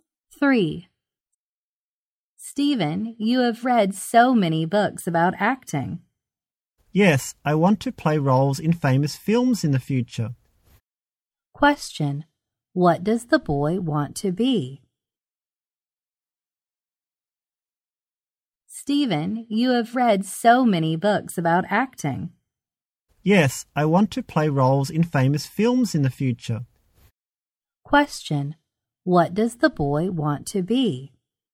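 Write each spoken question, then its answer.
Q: What does the boy want to be?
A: An actor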